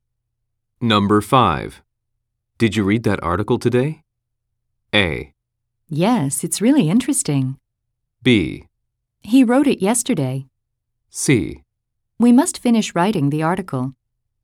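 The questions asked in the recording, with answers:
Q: Did you read that article today?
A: A: Yes, it's really interesting.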